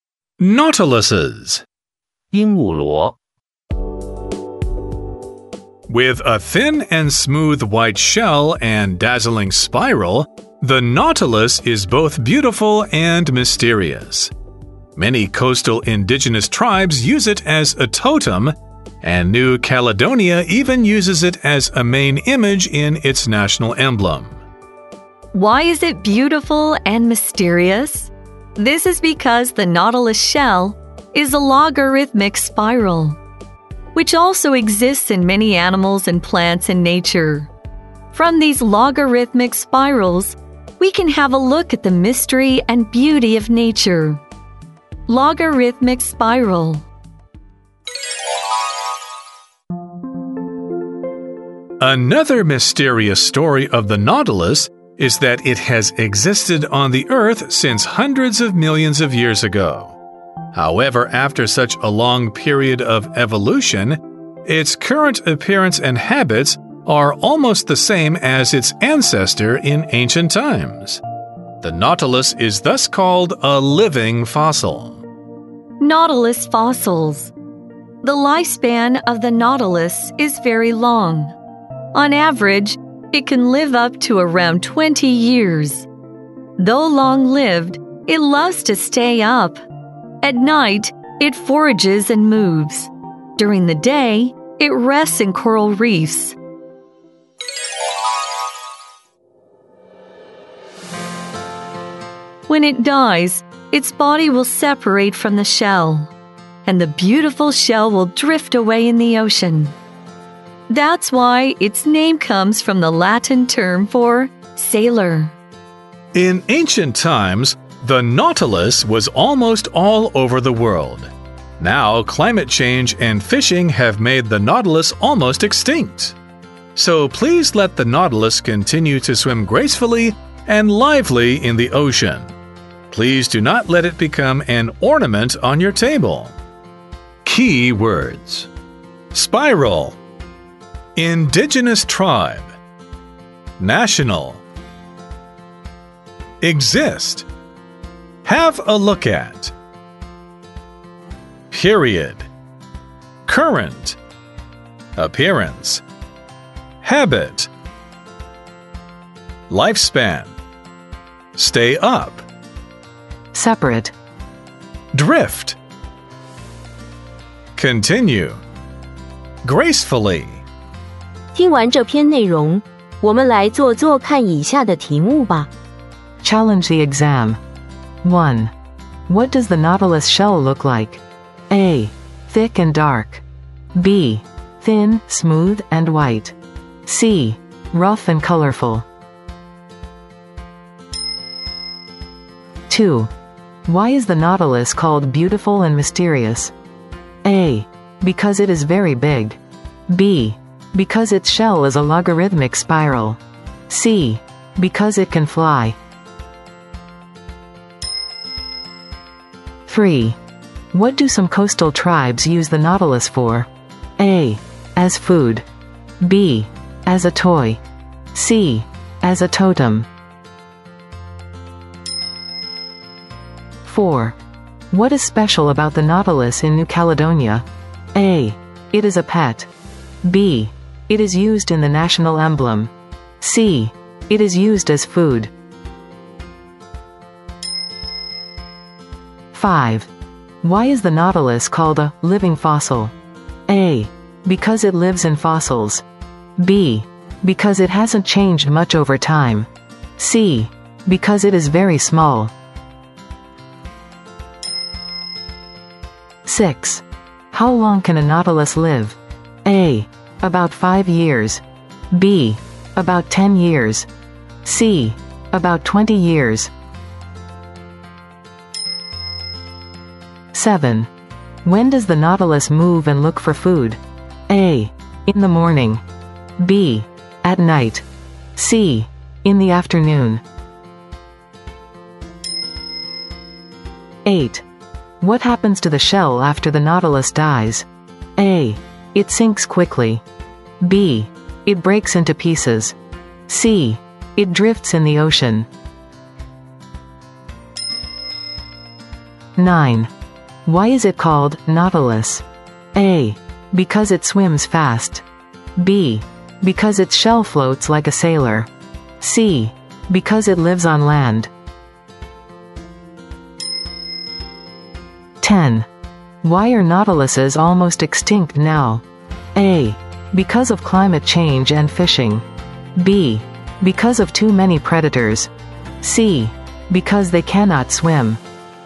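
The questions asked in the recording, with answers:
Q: What does the nautilus shell look like?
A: B: Thin, smooth, and white.

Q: Why is the nautilus called beautiful and mysterious?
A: B: Because its shell is a logarithmic spiral.

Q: What do some coastal tribes use the nautilus for?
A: C: As a totem.

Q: What is special about the nautilus in New Caledonia?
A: B: It is used in the national emblem.

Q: Why is the nautilus called a living fossil?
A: B: Because it hasn't changed much over time.

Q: How long can a nautilus live?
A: C: About 20 years.

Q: When does the nautilus move and look for food?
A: B: At night.

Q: What happens to the shell after the nautilus dies?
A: C: It drifts in the ocean.

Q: Why is it called nautilus?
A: B: Because its shell floats like a sailor.

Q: Why are nautiluses almost extinct now?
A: A: Because of climate change and fishing.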